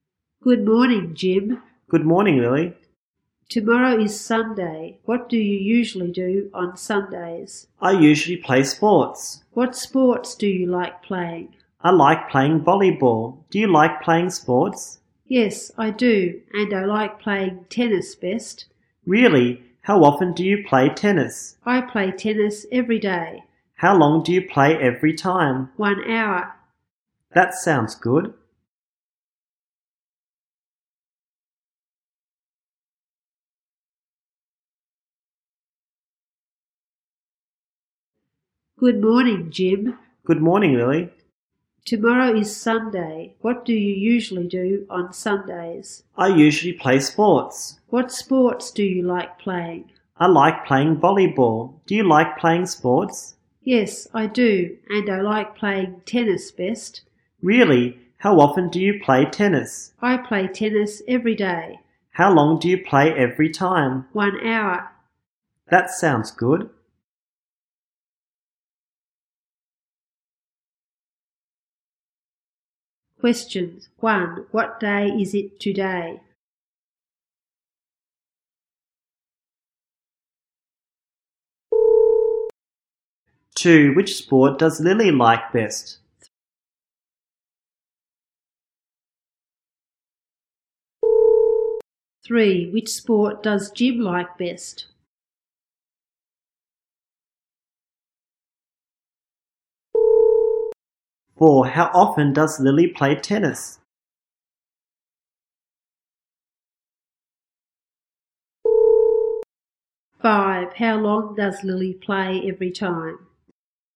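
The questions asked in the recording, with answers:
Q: What day is it today?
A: Saturday

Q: Which sport does Lily like best?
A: Tennis

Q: How often does Lily play tennis?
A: Every day

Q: How long does Lily play every time?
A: 1 hour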